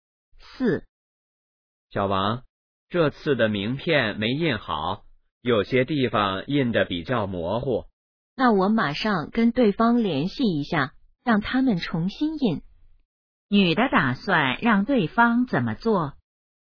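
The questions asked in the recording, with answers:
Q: 女的打算让对方怎么做?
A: 重新印名片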